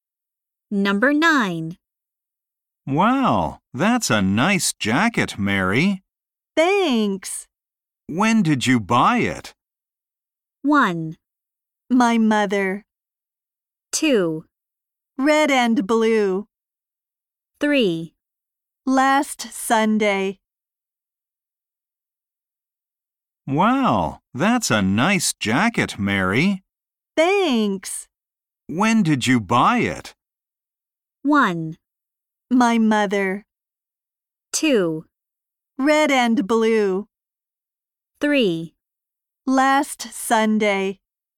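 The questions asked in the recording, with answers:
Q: When did you buy it?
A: 3: Last Sunday.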